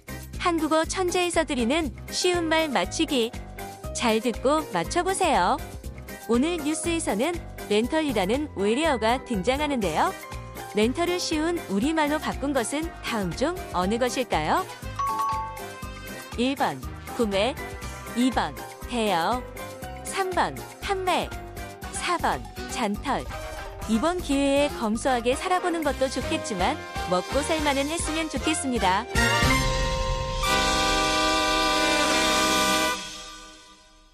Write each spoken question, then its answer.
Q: 렌털을 쉬운 우리말로 바꾼 것은 다음 중 어느 것일까요?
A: But in Korean, we would say the term number two, 대여.